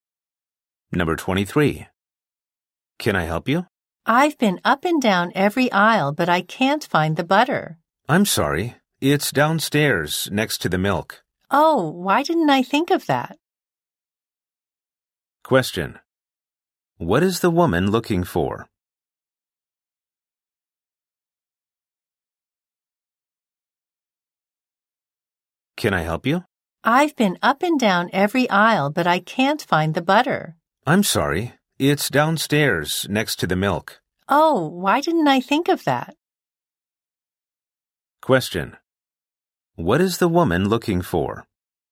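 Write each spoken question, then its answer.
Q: What is the woman looking for?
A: Butter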